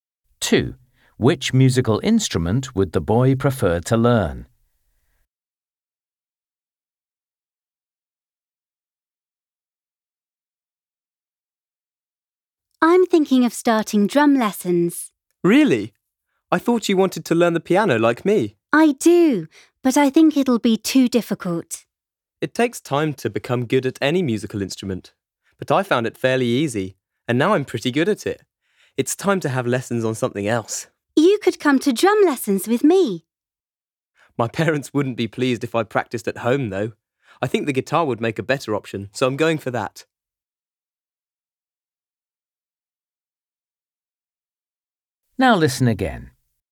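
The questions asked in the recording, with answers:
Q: Which musical instrument would the boy prefer to learn?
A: The guitar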